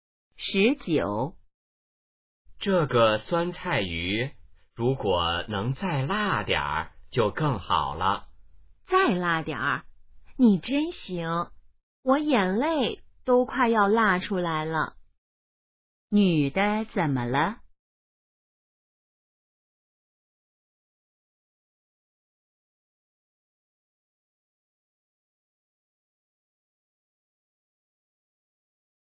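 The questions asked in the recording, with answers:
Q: 女的怎么了?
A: 辣得快流眼泪了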